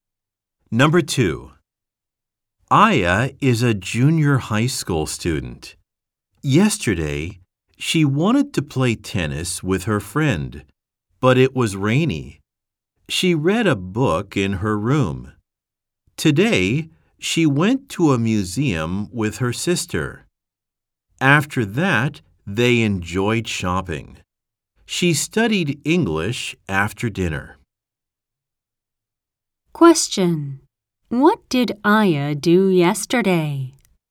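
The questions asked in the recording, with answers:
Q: What did Aya do yesterday?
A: She read a book in her room.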